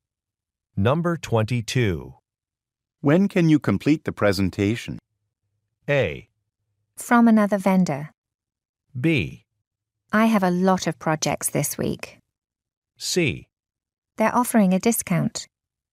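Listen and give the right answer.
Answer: B: I have a lot of projects this week.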